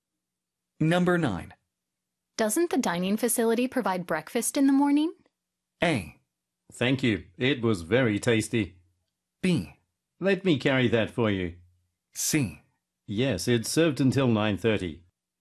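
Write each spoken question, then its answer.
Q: Doesn't the dining facility provide breakfast in the morning?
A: C: Yes, it's served until 9:30.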